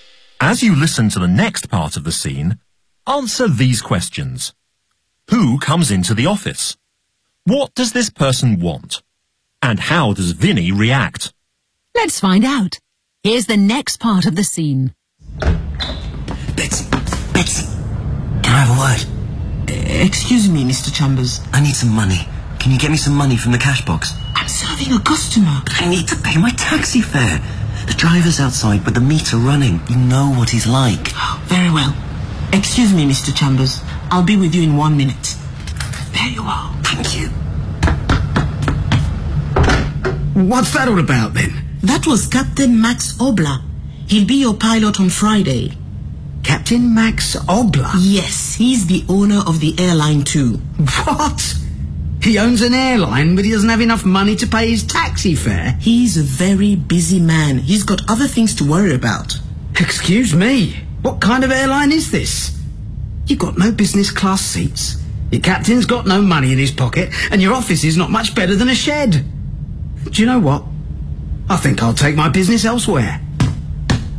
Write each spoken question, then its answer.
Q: Who comes into the office?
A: Captain Max Obla. He's the pilot of the plane, and he's also the owner of the airline.

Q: What does this person want?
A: He wants some money to pay his taxi fare, because the driver is waiting outside.

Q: And how does Vinnie react?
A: Well, he's not impressed.